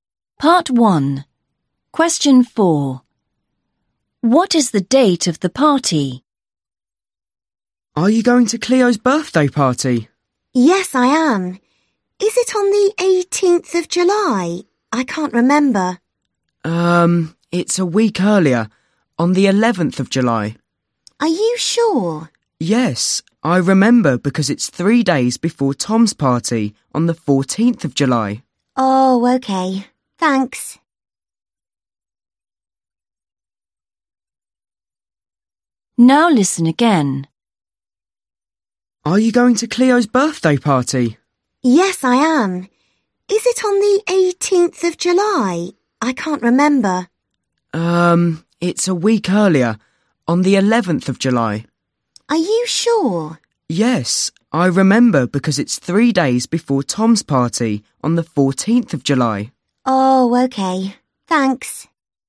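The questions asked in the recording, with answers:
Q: What is the date of the party?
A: 11th of July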